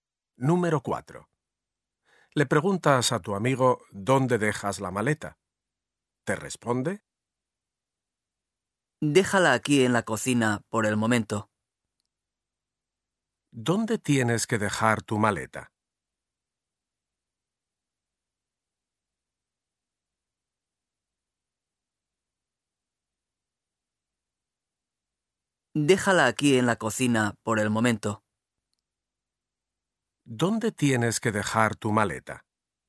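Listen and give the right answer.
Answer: En la cocina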